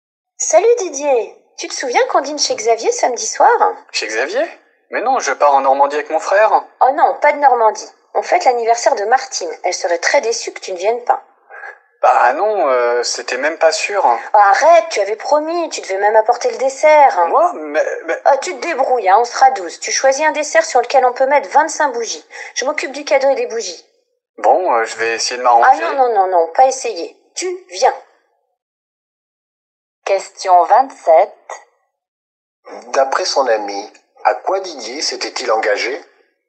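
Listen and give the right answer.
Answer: À apporter le dessert pour le dîner d'anniversaire de Martine chez Xavier samedi soir.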